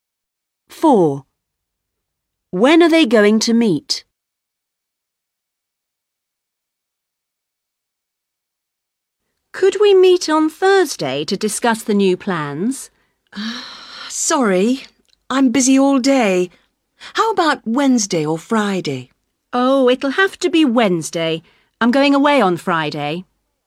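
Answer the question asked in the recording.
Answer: On Wednesday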